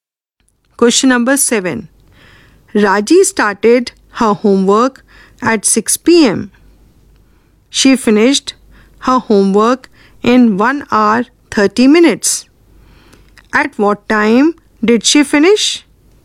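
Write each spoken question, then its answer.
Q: At what time did she finish?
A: 7:30 p.m.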